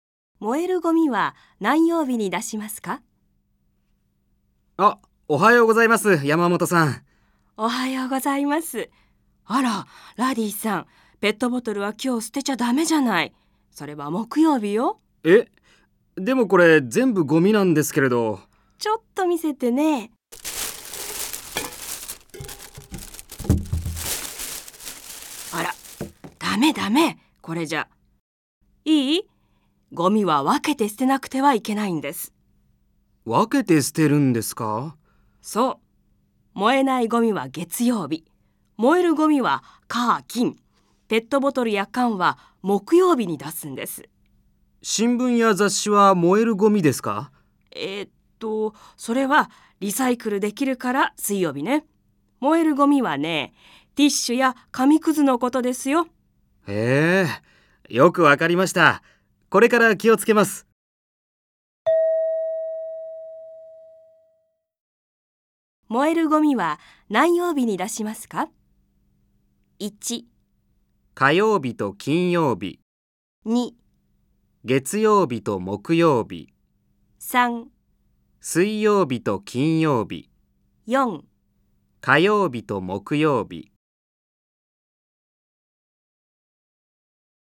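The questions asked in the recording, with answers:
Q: 燃えるゴミは何曜日に出しますか?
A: 1: 火曜日と金曜日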